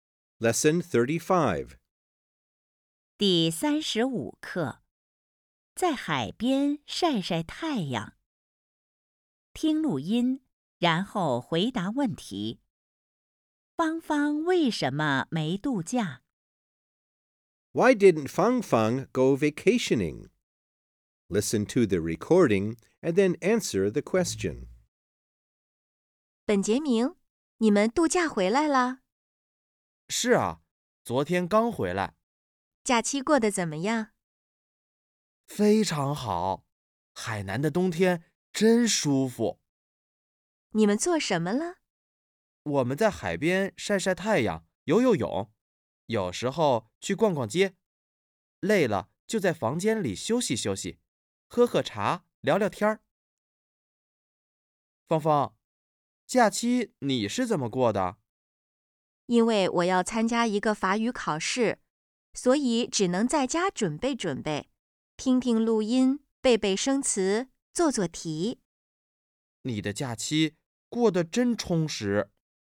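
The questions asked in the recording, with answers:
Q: 芳芳为什么没度假?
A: 因为她要参加一个法语考试,只能在家准备。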